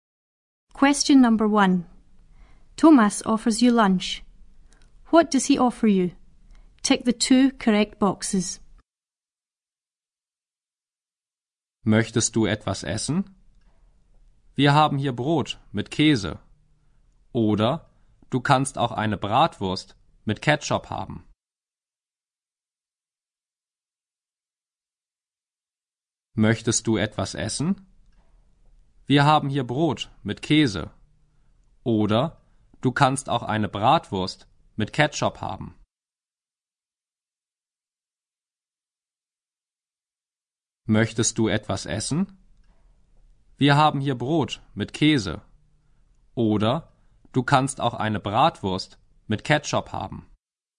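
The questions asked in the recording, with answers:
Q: What does he offer you?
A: Bread with cheese, or a bratwurst with ketchup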